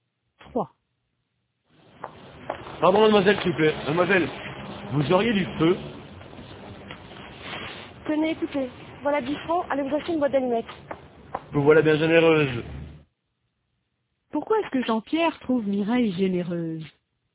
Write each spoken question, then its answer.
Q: Pourquoi est-ce que Jean-Pierre trouve Mireille généreuse?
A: Parce qu'elle lui a donné 10 francs.